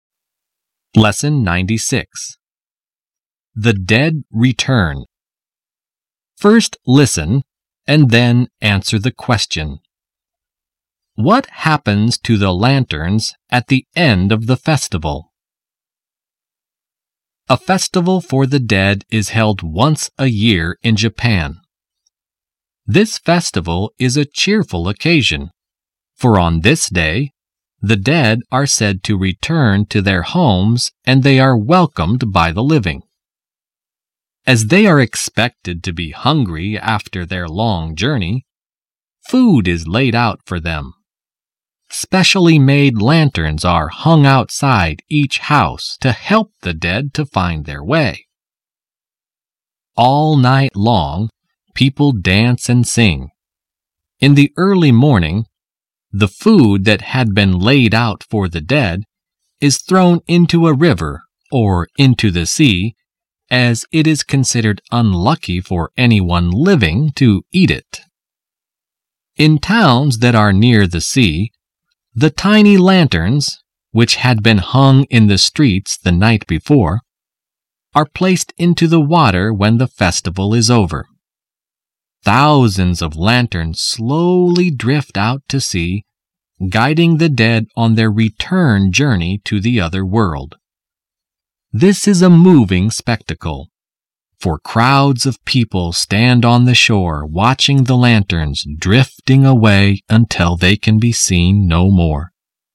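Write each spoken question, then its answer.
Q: What happens to the lanterns at the end of the festival?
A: They are placed into the water and drift out to sea, guiding the dead back to the other world.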